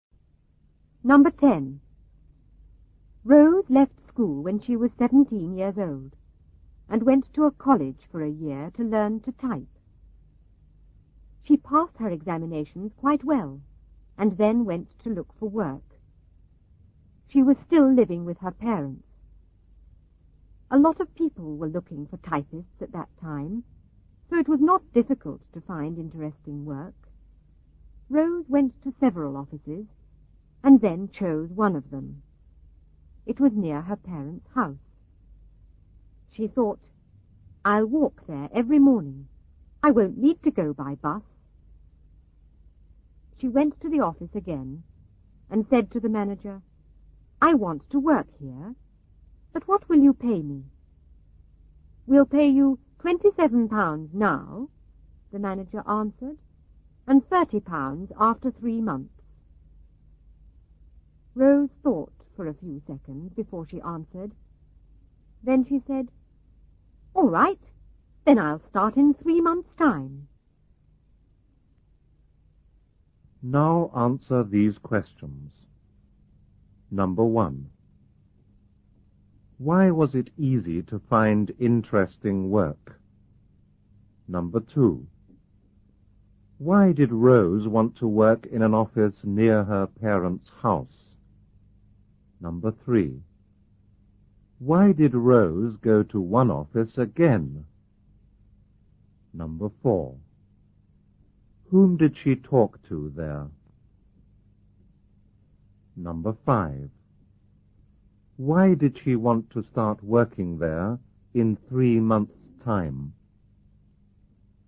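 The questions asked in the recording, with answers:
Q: Why was it easy to find interesting work?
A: A lot of people were looking for typists at that time.

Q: Why did Rose want to work in an office near her parents' house?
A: She could walk there every morning and wouldn't need to go by bus.

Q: Why did Rose go to one office again?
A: She had chosen it and wanted to work there and ask about pay.

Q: Whom did she talk to there?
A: The manager.

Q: Why did she want to start working there in 3 months' time?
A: Because the pay would be £30 after 3 months instead of £27.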